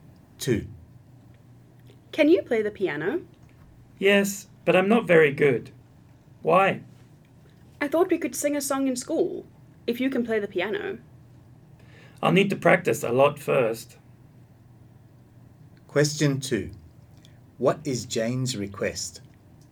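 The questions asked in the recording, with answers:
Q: What is Jane's request?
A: That Mike play the piano so they can sing a song at school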